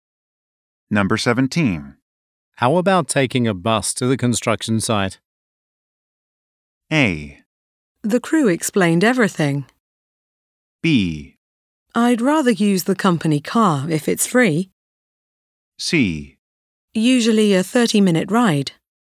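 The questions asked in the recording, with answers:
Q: How about taking a bus to the construction site?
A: B: I'd rather use the company car if it's free.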